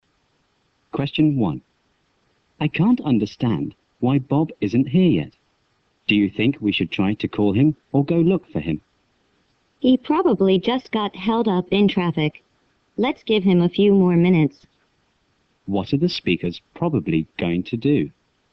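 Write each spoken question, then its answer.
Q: What are the speakers probably going to do?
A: Wait a few more minutes for Bob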